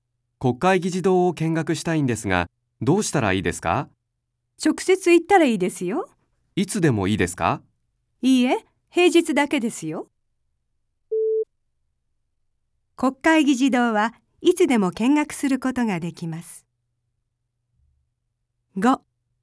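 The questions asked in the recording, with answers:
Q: 国会議事堂はいつでも見学することができます。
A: 正しくない(×):平日だけ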